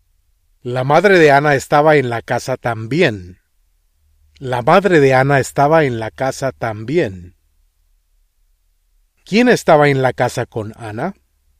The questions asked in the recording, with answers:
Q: ¿Quién estaba en la casa con Anna?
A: Su madre.